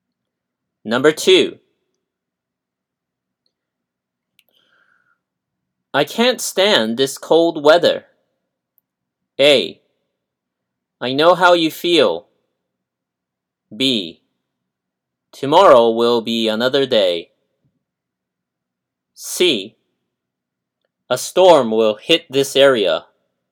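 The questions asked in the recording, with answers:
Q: I can't stand this cold weather.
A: A: I know how you feel.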